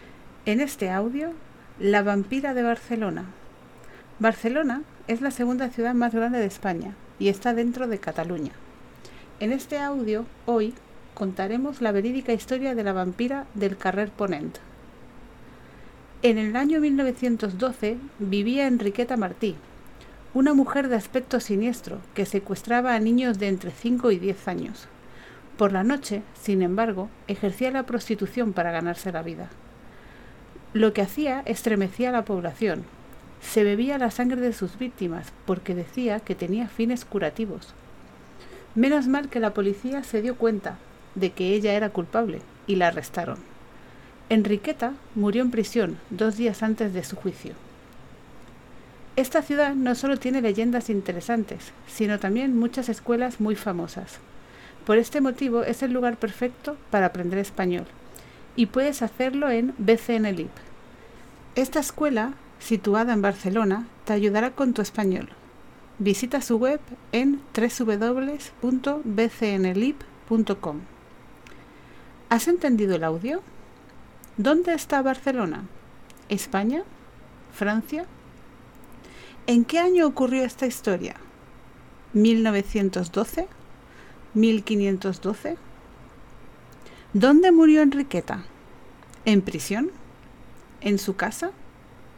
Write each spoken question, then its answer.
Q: ¿Dónde está Barcelona?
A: España

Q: ¿En qué año ocurrió esta historia?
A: 1912

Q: ¿Dónde murió Enriqueta?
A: en prisión